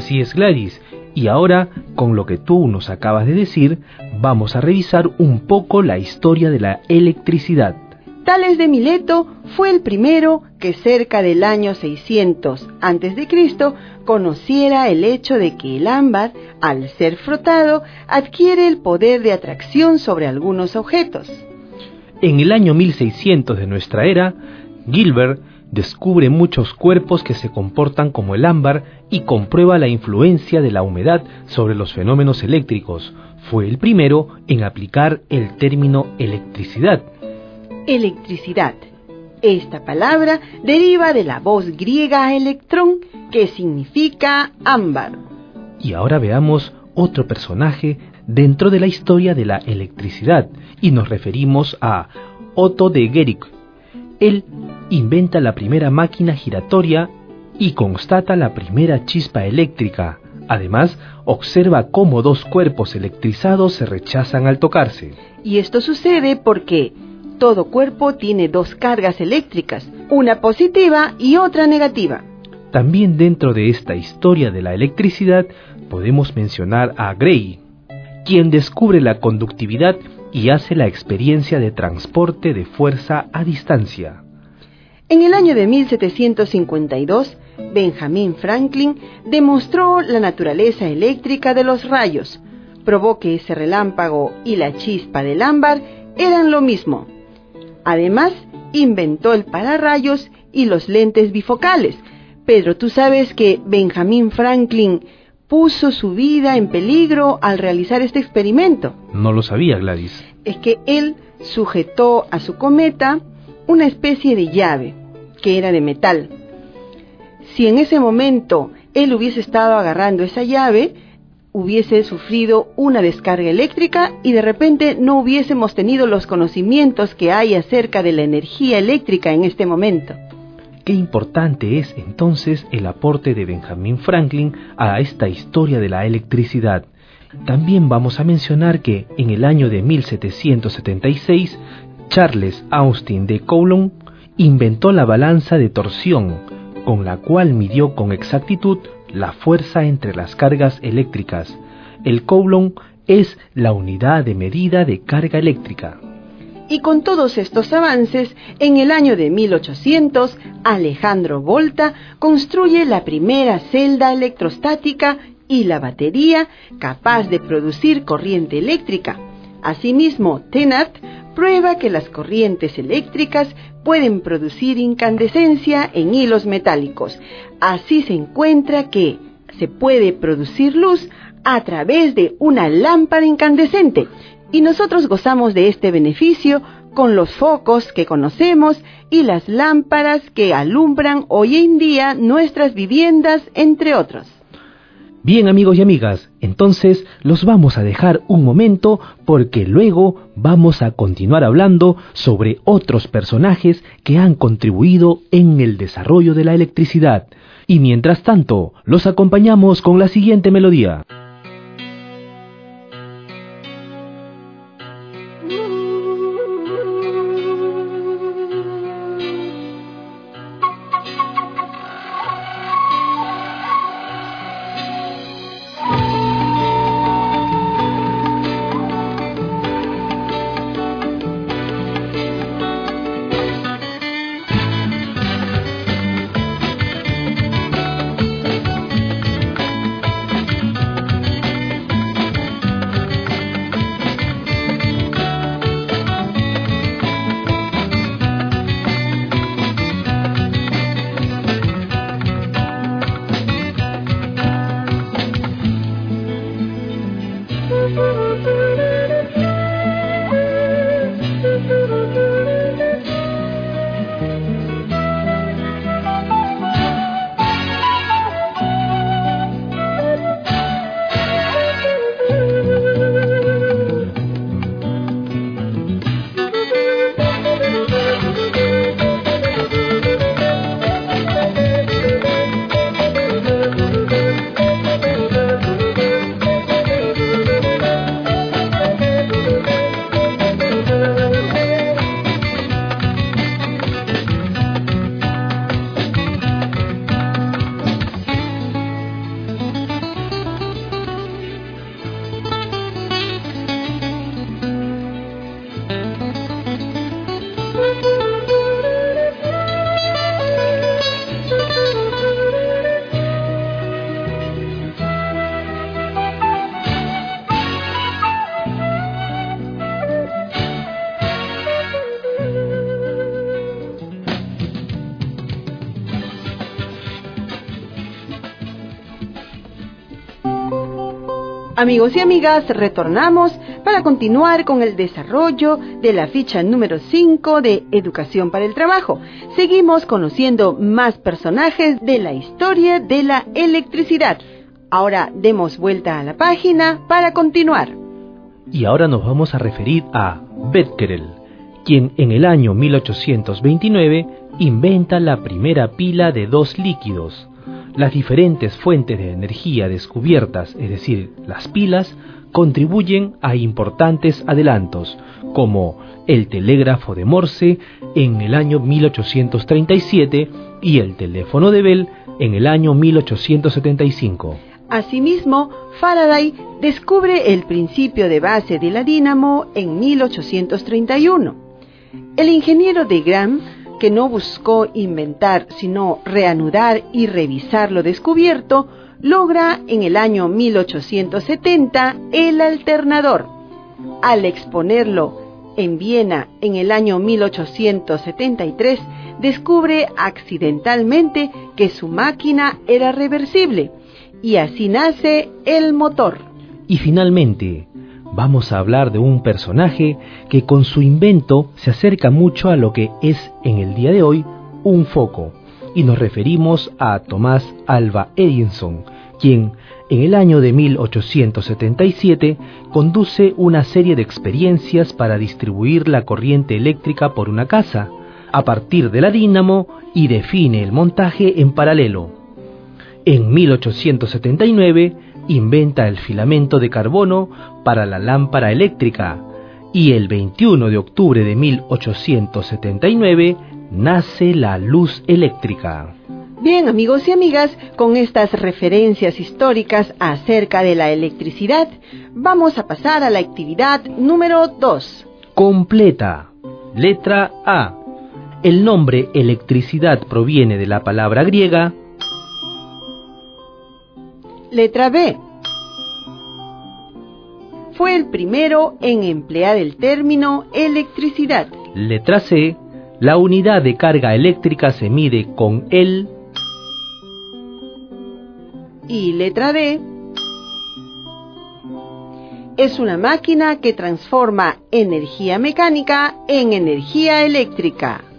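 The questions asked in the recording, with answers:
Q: El nombre electricidad proviene de la palabra griega.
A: electrón (ámbar)

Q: Fue el primero en emplear el término electricidad.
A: Gilbert

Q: La unidad de carga eléctrica se mide con el.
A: Coulomb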